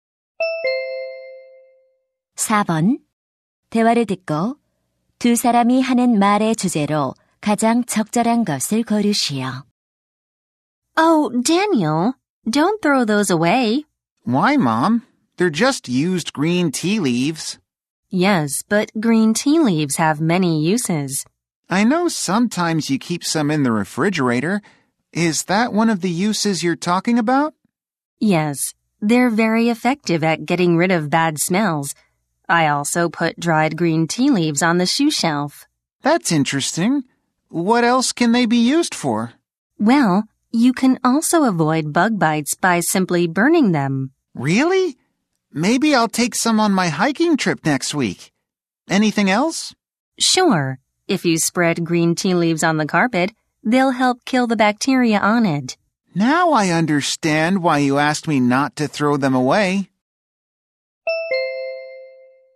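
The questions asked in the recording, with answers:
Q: 대화를 듣고 두 사람이 하는 말의 주제로 가장 적절한 것을 고르시오.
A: 다 쓴 녹차 잎의 다양한 활용법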